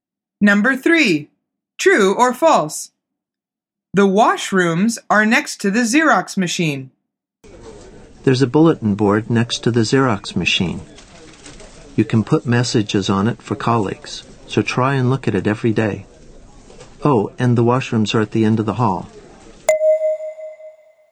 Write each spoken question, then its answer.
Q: The washrooms are next to the Xerox machine.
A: The answer is false. He says, the washrooms are at the end of the hall.